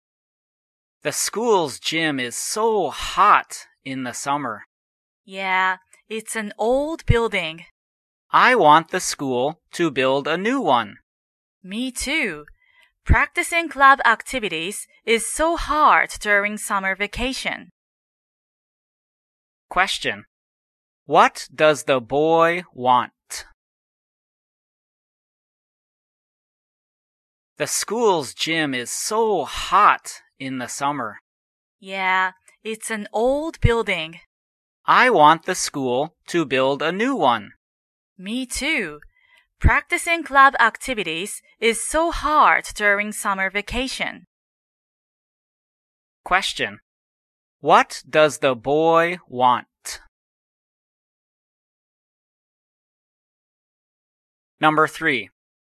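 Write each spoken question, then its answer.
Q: What does the boy want?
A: He wants the school to build a new gym.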